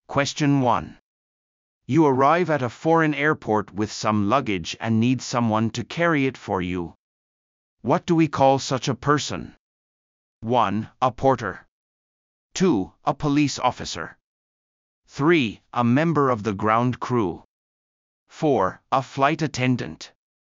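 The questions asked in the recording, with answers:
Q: What do we call such a person?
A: 1: A porter.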